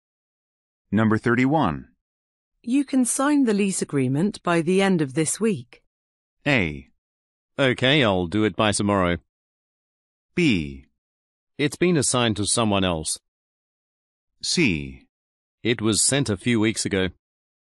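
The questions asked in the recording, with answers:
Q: You can sign the lease agreement by the end of this week.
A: A: Okay, I'll do it by tomorrow.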